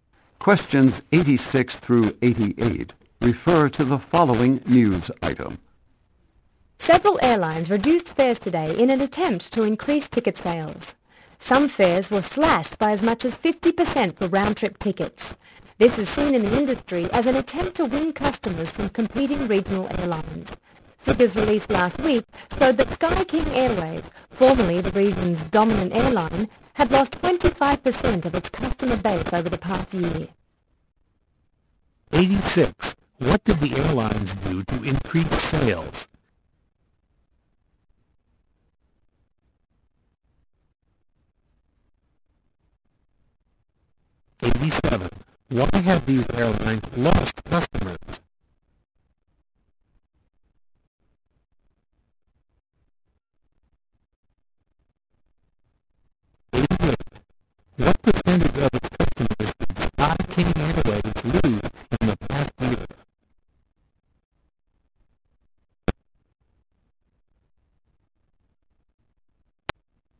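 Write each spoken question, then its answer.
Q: What did the airlines do to increase sales?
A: Reduced fares

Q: What percentage of its customers did Sky King Airways lose in the past year?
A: 25%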